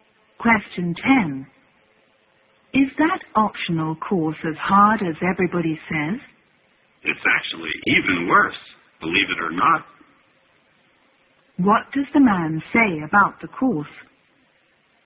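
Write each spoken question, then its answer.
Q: What does the man say about the course?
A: It is even harder than everybody says.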